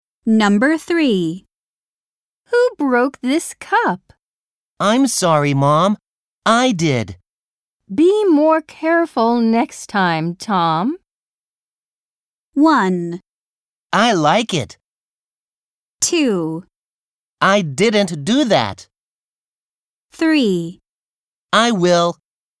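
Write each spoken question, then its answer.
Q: Be more careful next time, Tom.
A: 3: I will.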